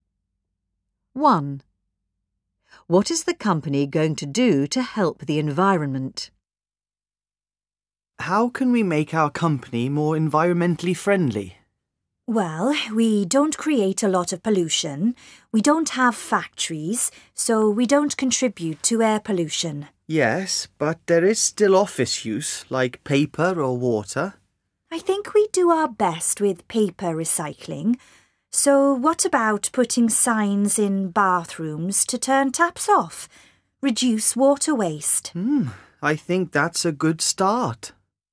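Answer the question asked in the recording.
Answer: Put signs in the bathrooms telling people to turn the taps off, to cut water waste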